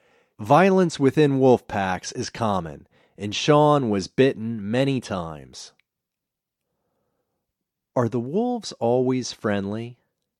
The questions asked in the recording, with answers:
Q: Are the wolves always friendly?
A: No, the wolf packs aren't always friendly.